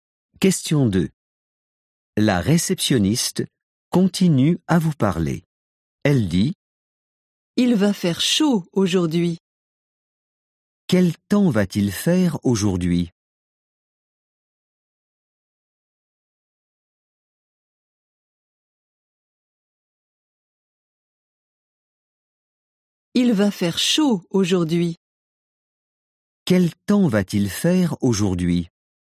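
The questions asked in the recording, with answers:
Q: Quel temps va-t-il faire aujourd'hui ?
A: Il va faire chaud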